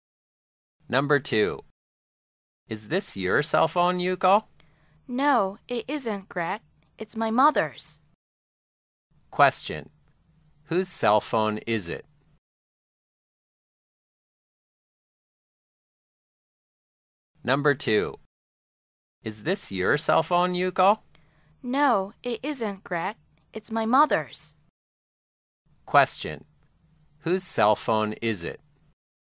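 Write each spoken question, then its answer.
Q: Whose cell phone is it?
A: Yuko's mother's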